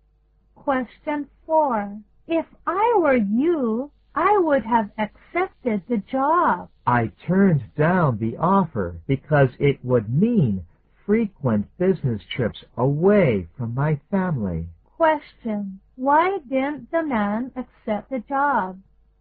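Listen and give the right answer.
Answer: It would have meant frequent business trips away from his family.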